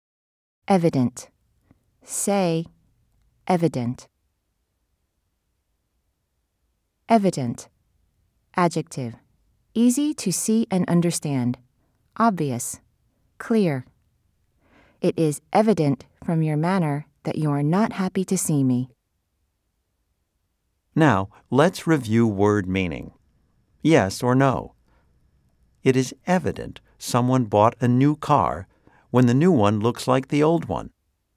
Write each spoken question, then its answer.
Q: Yes or no? It is evident someone bought a new car when the new one looks like the old one.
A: If you said no, you are correct.